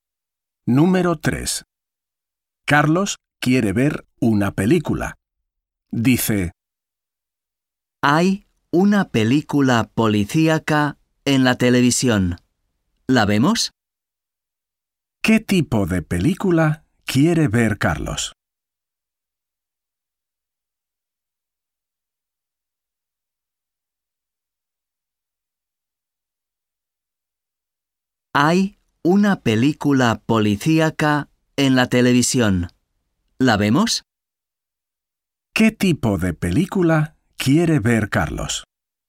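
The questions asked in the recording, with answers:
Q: ¿Qué tipo de película quiere ver Carlos?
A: una película policíaca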